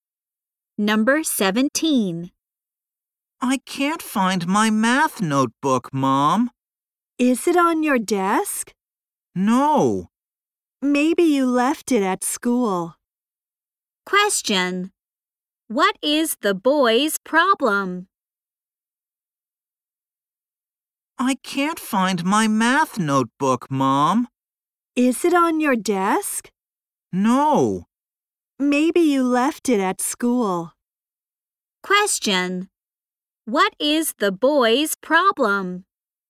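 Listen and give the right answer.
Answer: He can't find his math notebook.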